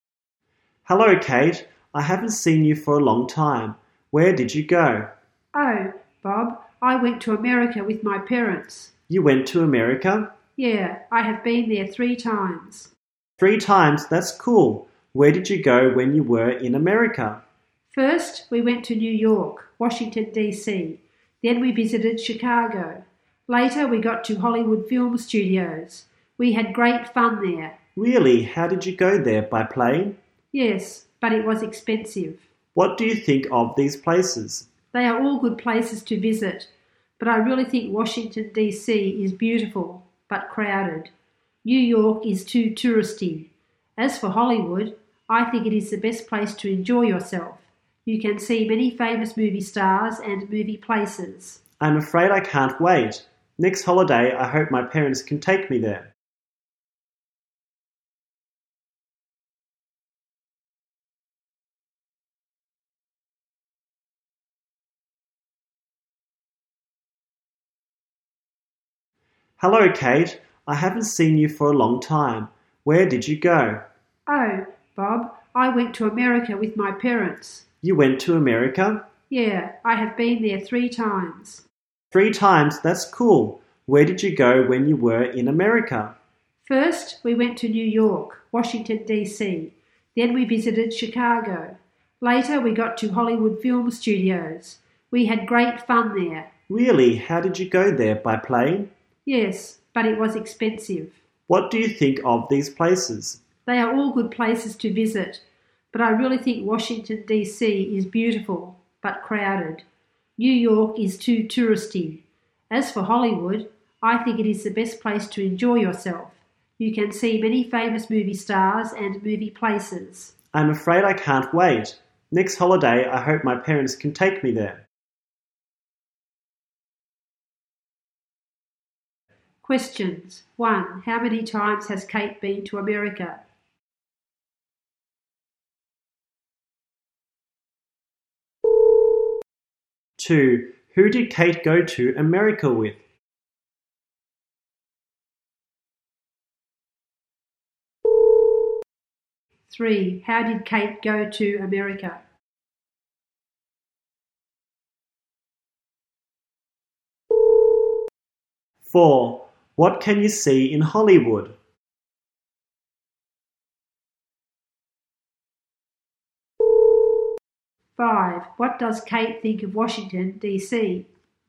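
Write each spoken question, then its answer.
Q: How many times has Kate been to America?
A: 3 times

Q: Who did Kate go to America with?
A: Her parents

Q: How did Kate go to America?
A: By plane

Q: What can you see in Hollywood?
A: Many famous movie stars and movie places

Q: What does Kate think of Washington, D.C.?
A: Beautiful but crowded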